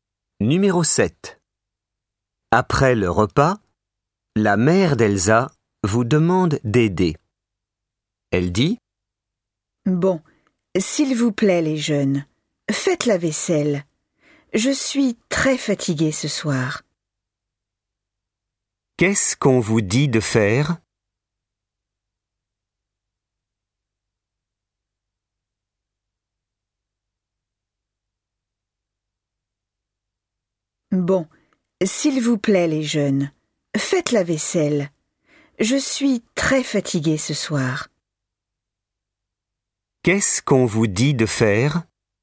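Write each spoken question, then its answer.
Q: Qu'est-ce qu'on vous dit de faire ?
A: La vaisselle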